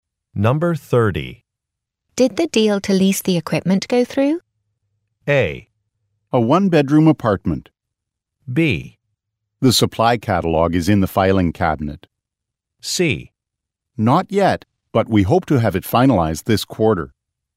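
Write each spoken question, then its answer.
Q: Did the deal to lease the equipment go through?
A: C: Not yet, but we hope to have it finalized this quarter.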